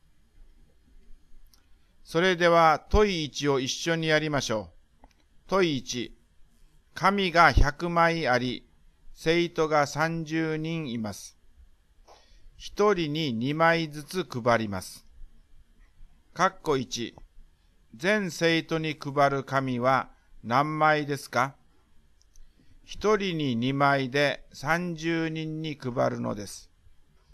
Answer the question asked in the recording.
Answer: 配った紙は 2×30 で60枚です。